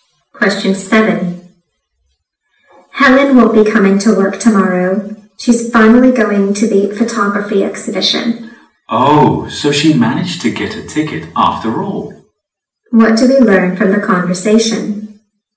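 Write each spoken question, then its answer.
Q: What do we learn from the conversation?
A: Helen got a ticket to the photography exhibition.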